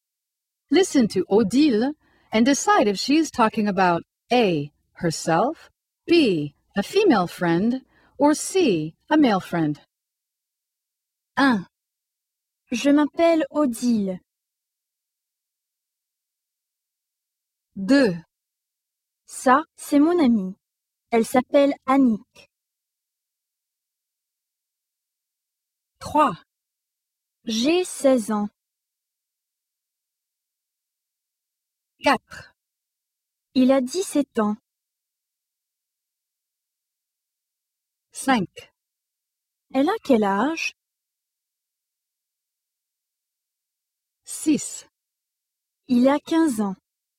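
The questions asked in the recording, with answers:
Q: Je m'appelle Odile.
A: A: herself

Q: Ça, c'est mon amie. Elle s'appelle Annick.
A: B: a female friend

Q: J'ai 16 ans.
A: A: herself

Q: Il a 17 ans.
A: C: a male friend

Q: Elle a quel âge?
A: B: a female friend

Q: Il a 15 ans.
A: C: a male friend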